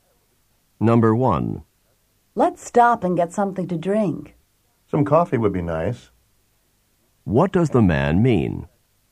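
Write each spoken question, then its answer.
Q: What does the man mean?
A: He would like some coffee.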